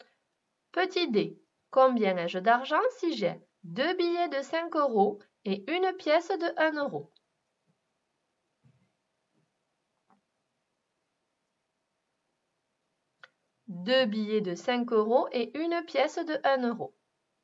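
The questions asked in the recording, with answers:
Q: combien ai-je d'argent si j'ai deux billets de 5 euros et une pièce de 1 euro?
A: 11 euros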